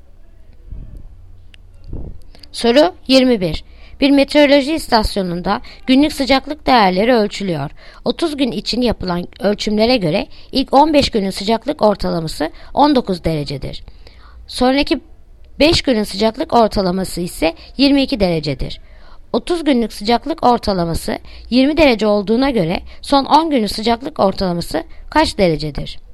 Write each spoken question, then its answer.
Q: 30 günlük sıcaklık ortalaması 20 derece olduğuna göre son 10 günün sıcaklık ortalaması kaç derecedir?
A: Yanıt Bursa 20,5